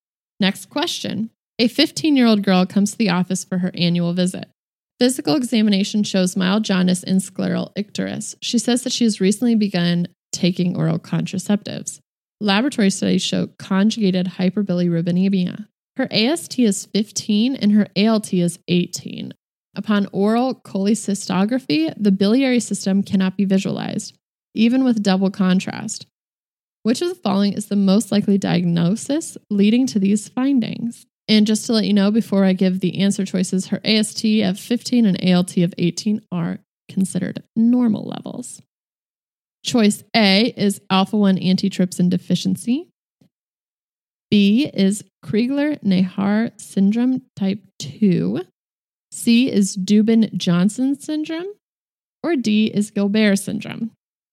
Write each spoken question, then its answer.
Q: Which of the following is the most likely diagnosis leading to these findings?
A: And the correct answer is C, Dubin-Johnson syndrome.